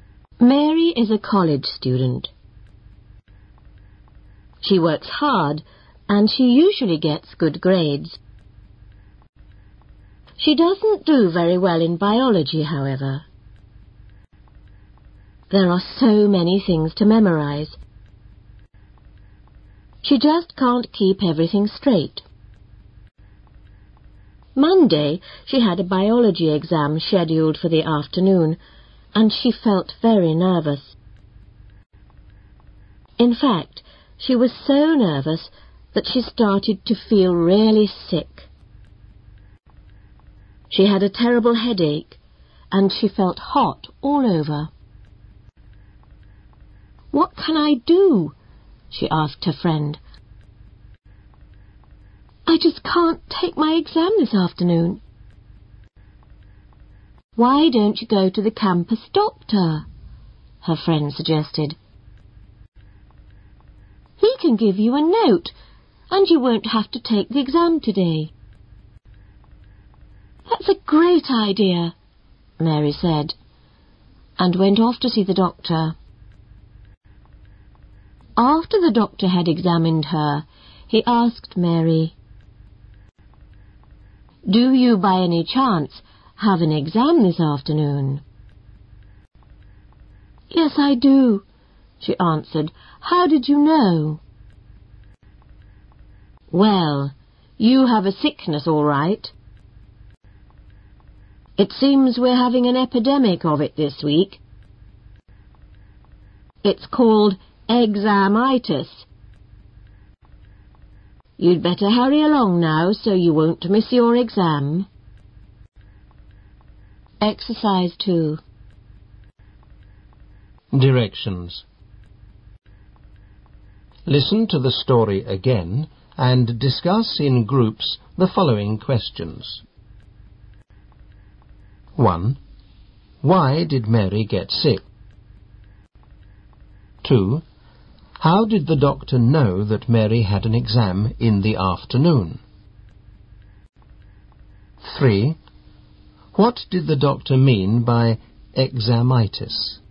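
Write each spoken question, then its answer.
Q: Why did Mary get sick?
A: She was very nervous about her biology exam.

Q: What did the doctor mean by examitis?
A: Feeling sick from nerves about an exam, not a real illness.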